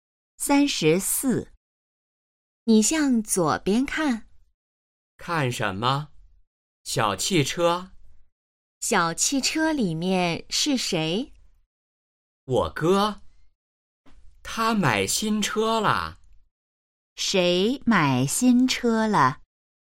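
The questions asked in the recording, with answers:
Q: 谁买新车了?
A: 说话人的哥哥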